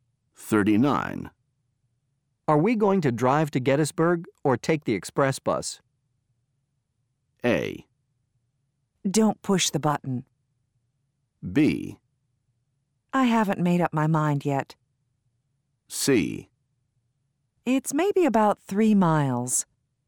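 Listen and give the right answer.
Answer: B: I haven't made up my mind yet.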